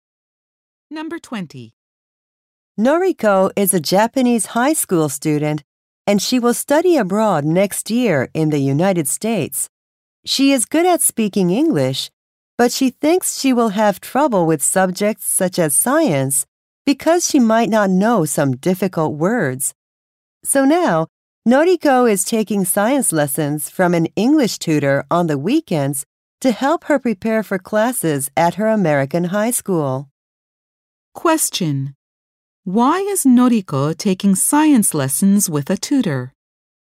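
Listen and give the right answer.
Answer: To prepare for science classes in English in the U.S.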